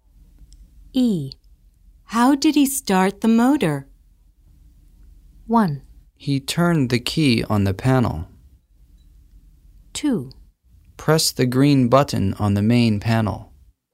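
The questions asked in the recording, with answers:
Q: How did he start the motor?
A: 1: He turned the key on the panel.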